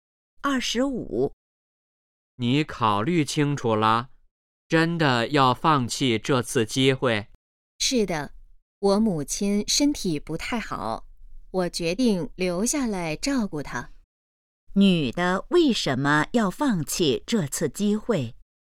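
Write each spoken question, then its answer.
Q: 女的为什么要放弃这次机会?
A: 要照顾母亲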